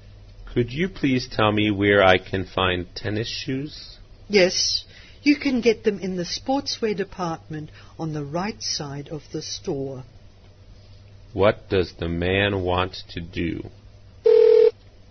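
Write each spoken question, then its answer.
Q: What does the man want to do?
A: Buy tennis shoes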